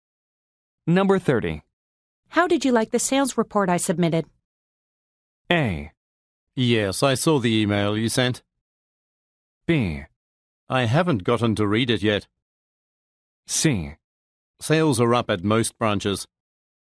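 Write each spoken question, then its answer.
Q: How did you like the sales report I submitted?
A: B: I haven't gotten to read it yet.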